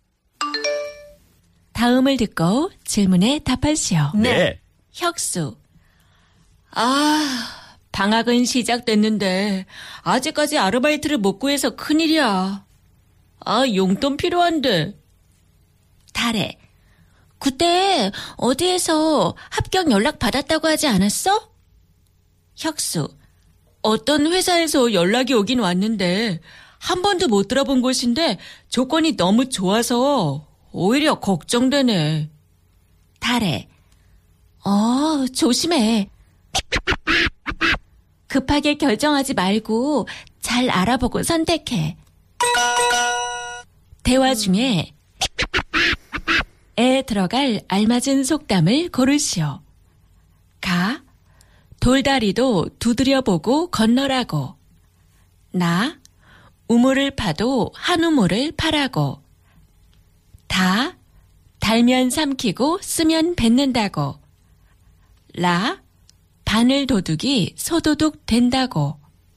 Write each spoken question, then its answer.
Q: 대화 중에 에 들어갈 알맞은 속담을 고르시오.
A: 가 돌다리도 두드려 보고 건너라고.